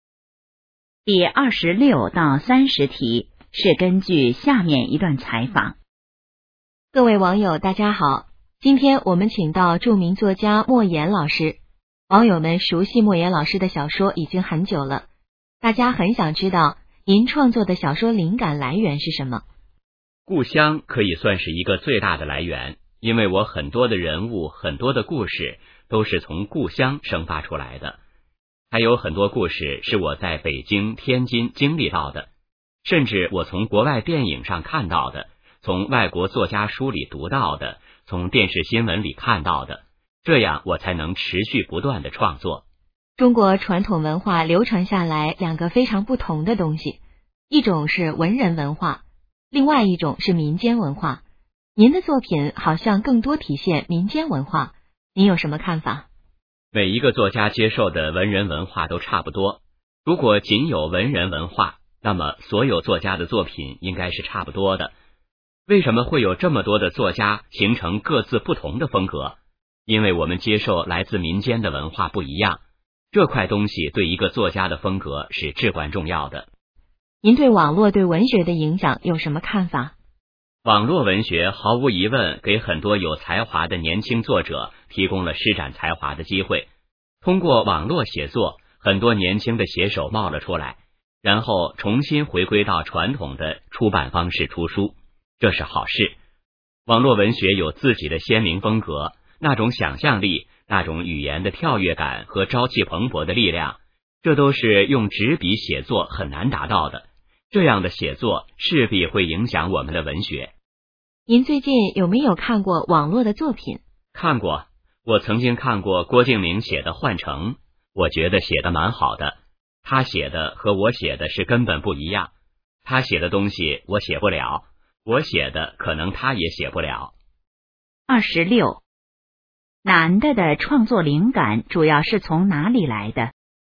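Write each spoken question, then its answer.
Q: 男的创作灵感主要是从哪里来的?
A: 故乡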